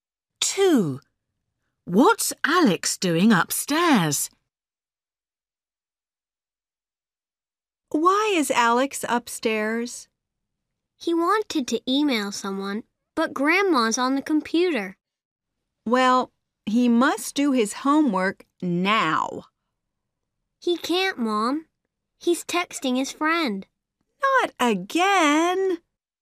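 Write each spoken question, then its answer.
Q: What's Alex doing upstairs?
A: Texting his friend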